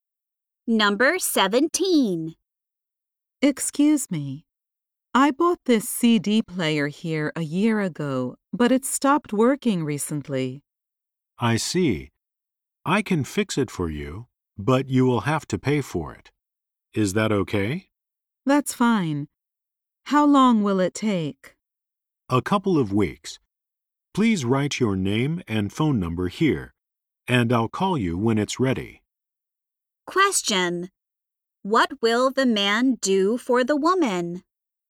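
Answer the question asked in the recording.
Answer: Fix her CD player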